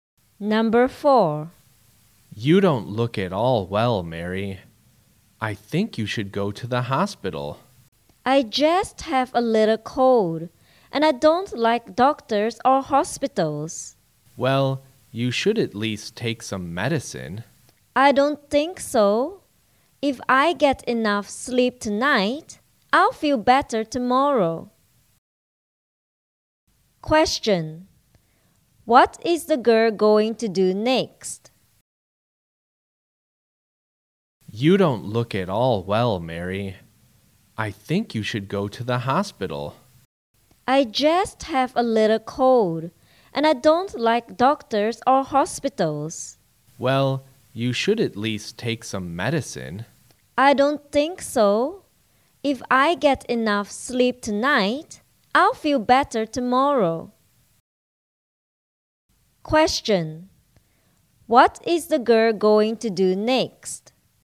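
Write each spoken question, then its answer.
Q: What is the girl going to do next?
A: Get enough sleep (go to bed)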